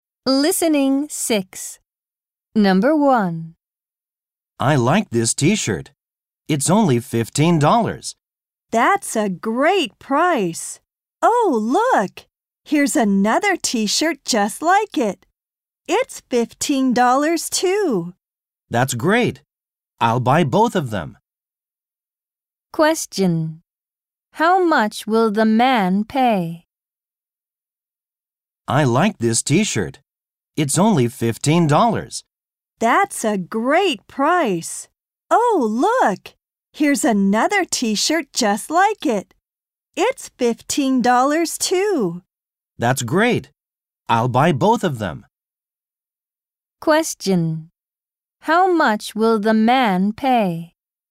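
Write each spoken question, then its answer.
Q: How much will the man pay?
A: $30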